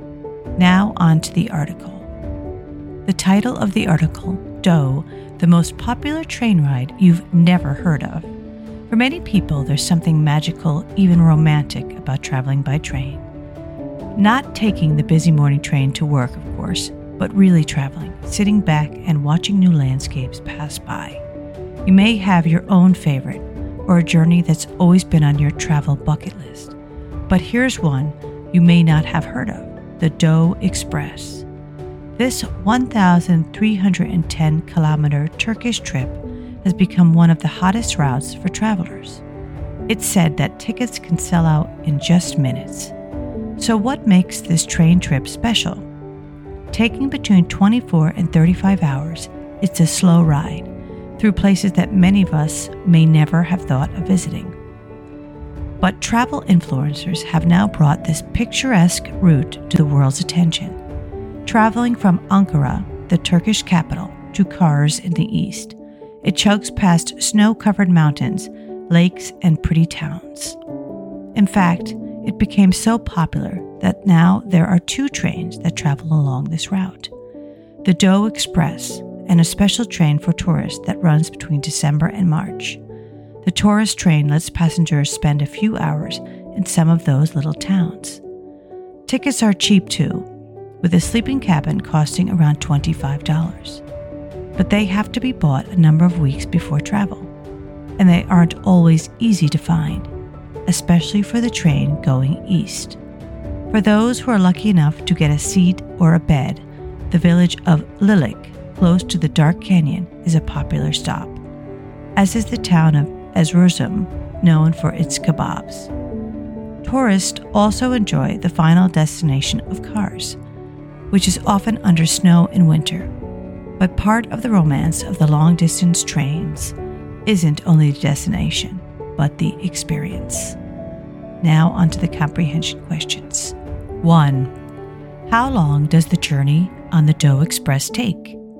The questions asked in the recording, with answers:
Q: How long does the journey on the Doe Express take?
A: Answer, between 24 and 35 hours.